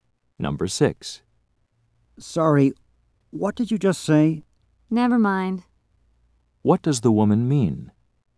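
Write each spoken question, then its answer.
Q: What does the woman mean?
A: What she said was not important.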